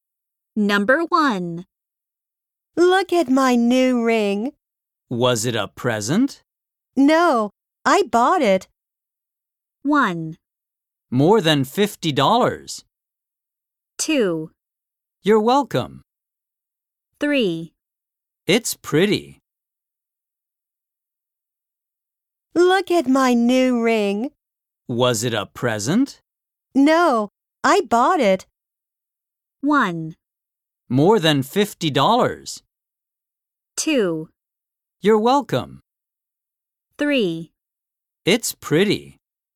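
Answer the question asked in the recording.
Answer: 3: It's pretty.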